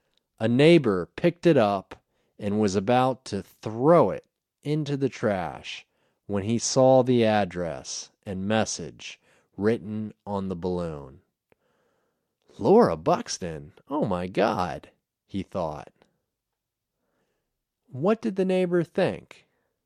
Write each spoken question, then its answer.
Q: What did the neighbor think?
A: The neighbor thought, Laura Buxton, oh my God.